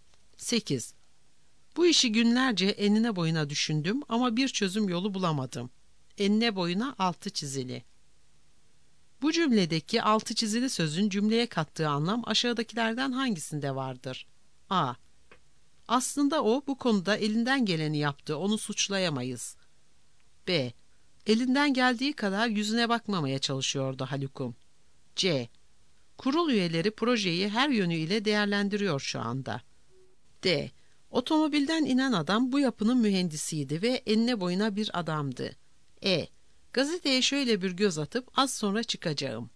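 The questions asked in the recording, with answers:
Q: Bu cümledeki altı çizili sözün cümleye kattığı anlam aşağıdakilerden hangisinde vardır?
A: C: Kurul üyeleri projeyi her yönüyle değerlendiriyor şu anda.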